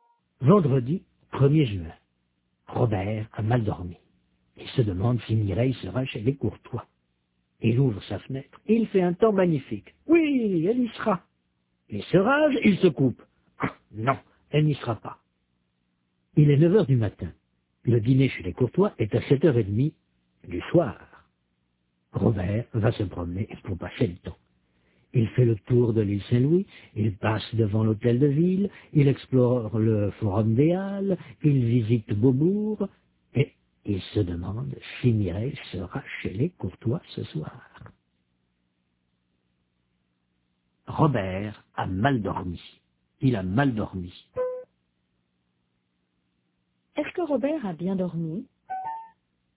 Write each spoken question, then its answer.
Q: Est-ce que Robert a bien dormi?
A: Non, il a mal dormi.